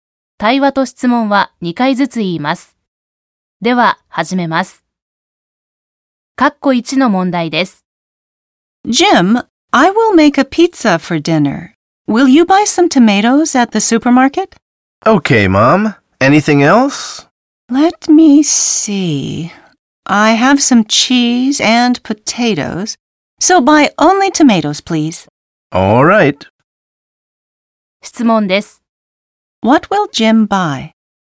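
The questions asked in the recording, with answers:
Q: What will Jim buy?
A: Tomatoes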